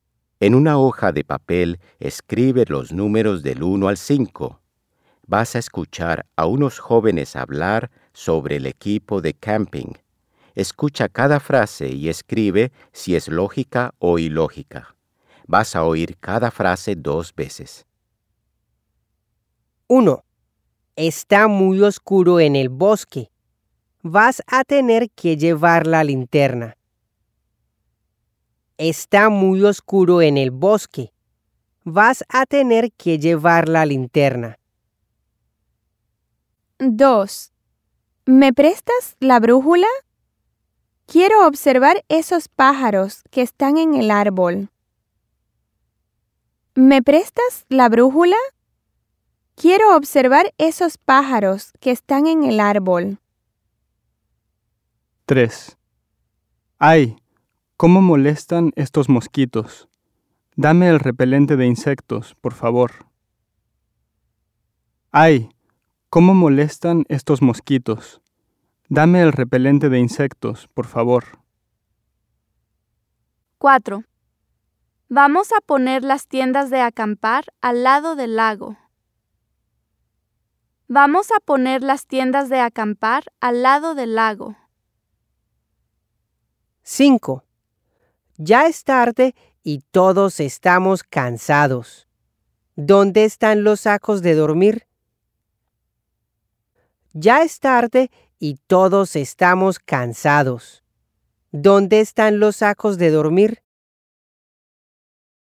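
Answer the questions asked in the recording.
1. lógica
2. ilógica
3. lógica
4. lógica
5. lógica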